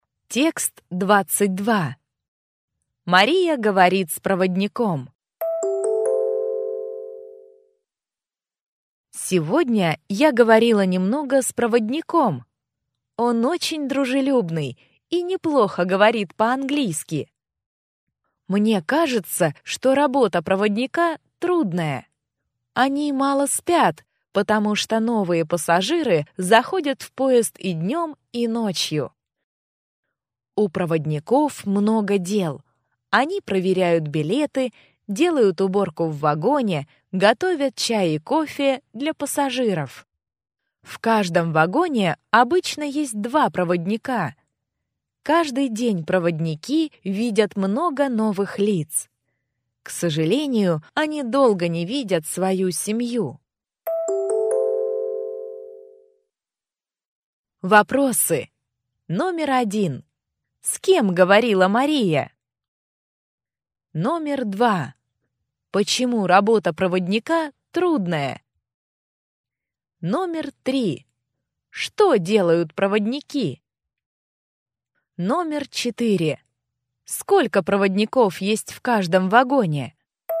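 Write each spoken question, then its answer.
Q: С кем говорила Мария?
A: С проводником

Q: Почему работа проводника трудная?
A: Они мало спят, потому что пассажиры заходят в поезд и днём, и ночью; у них много дел

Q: Что делают проводники?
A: Проверяют билеты, делают уборку в вагоне, готовят чай и кофе для пассажиров

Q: Сколько проводников есть в каждом вагоне?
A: Два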